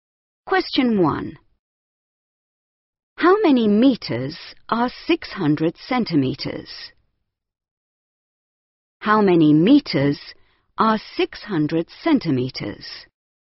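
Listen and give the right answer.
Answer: 6 metres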